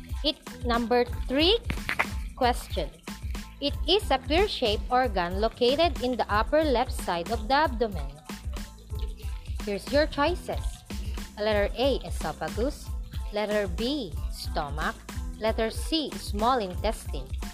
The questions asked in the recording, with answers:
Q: It is a pear-shaped organ located in the upper left side of the abdomen.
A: The correct answer is letter B, stomach.